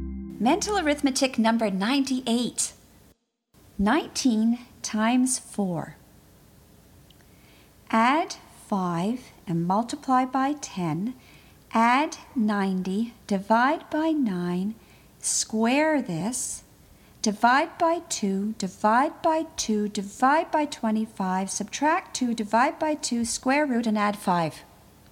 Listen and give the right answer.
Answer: And the answer is 12.